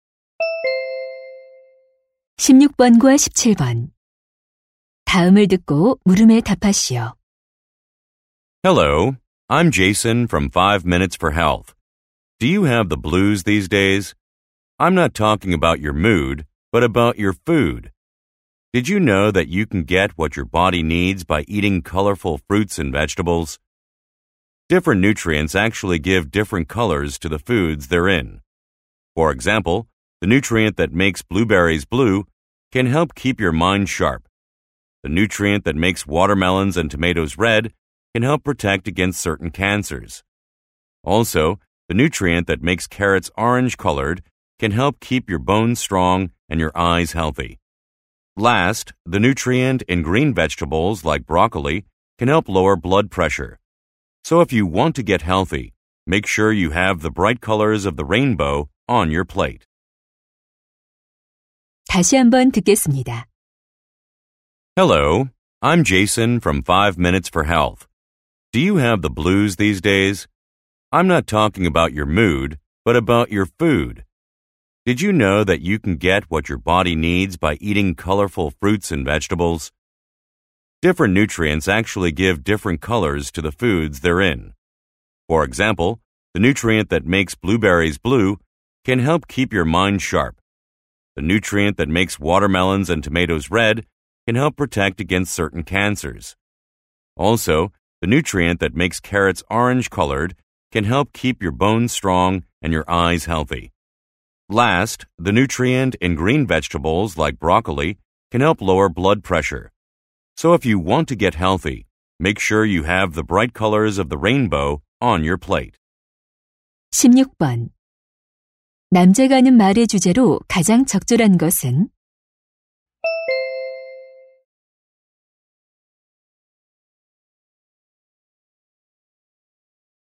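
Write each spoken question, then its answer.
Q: 남자가 하는 말의 주제로 가장 적절한 것은?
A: 다양한 색깔의 과일과 채소가 건강에 주는 이점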